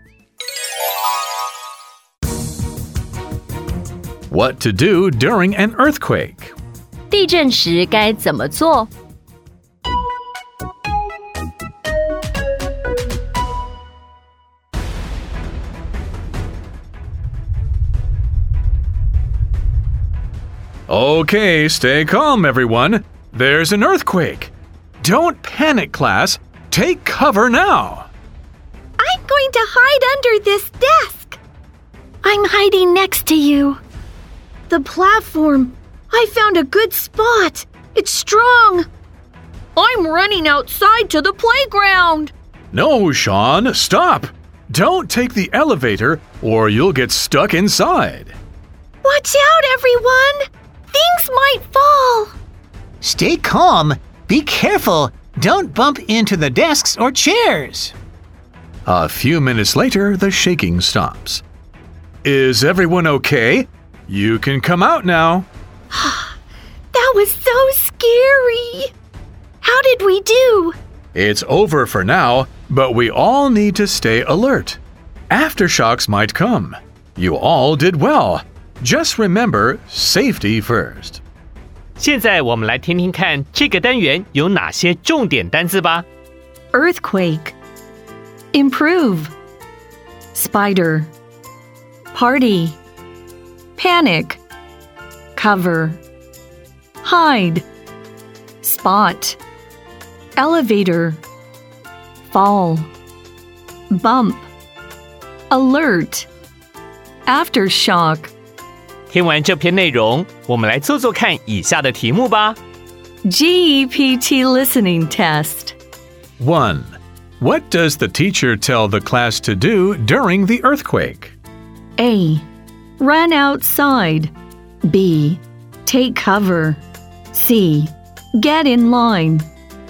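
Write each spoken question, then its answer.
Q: What does the teacher tell the class to do during the earthquake?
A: B: Take cover.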